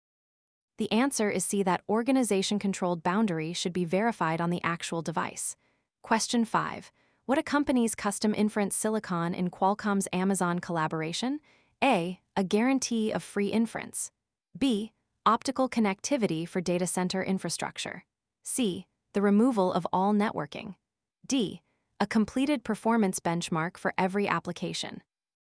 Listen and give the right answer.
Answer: The answer is B.